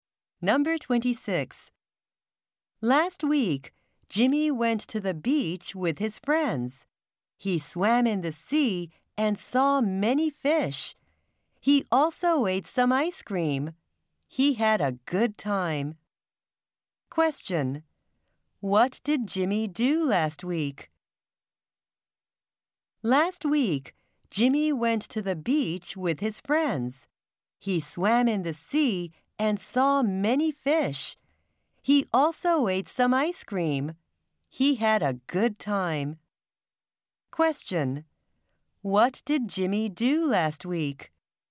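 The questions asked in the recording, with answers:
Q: What did Jimmy do last week?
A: He went to the beach with his friends.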